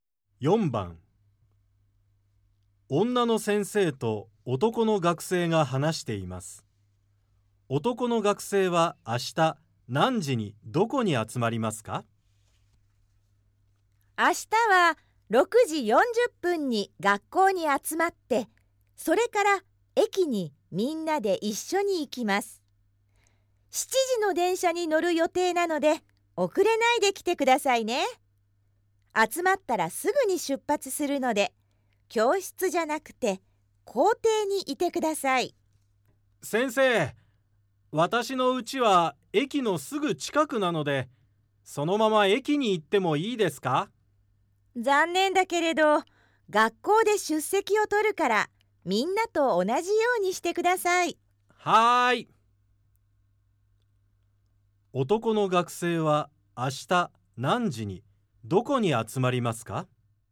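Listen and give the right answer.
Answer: 6時40分に学校の校庭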